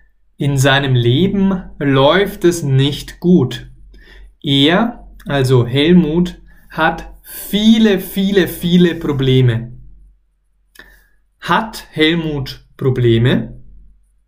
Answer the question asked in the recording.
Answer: Ja, ja, er hat Probleme.